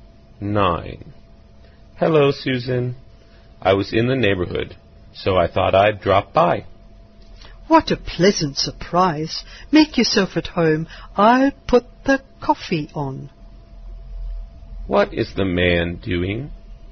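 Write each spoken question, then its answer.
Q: What is the man doing?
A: Dropping by to visit Susan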